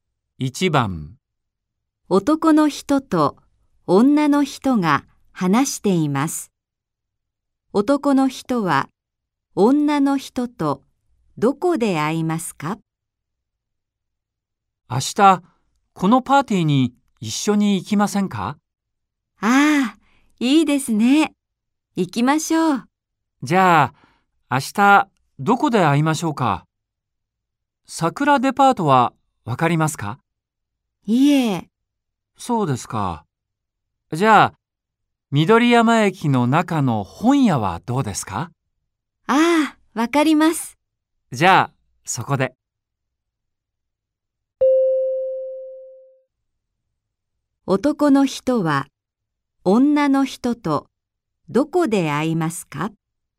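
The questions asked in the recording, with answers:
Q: 男の人は、女の人と、どこで会いますか?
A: 緑山駅の中の本屋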